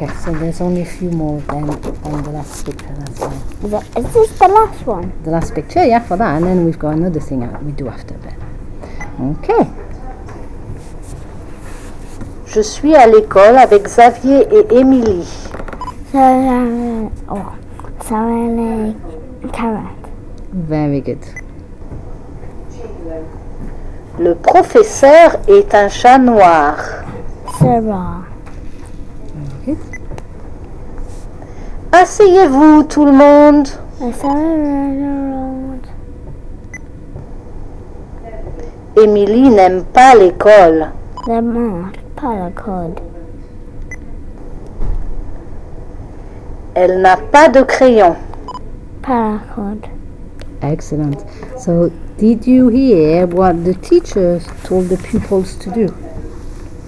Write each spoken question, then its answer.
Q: So, did you hear what the teachers told the pupils to do?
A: Sit down.